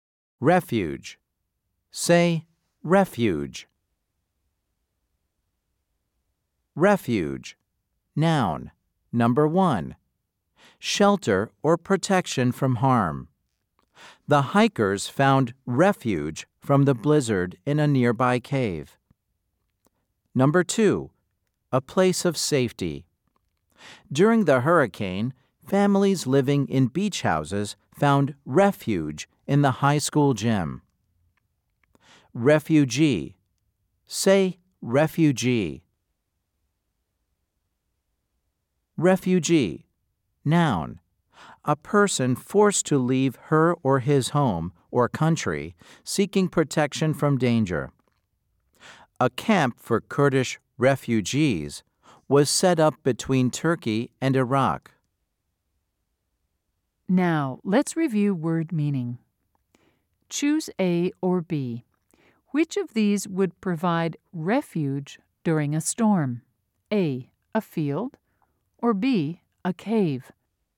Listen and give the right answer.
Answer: If you said B, you were right.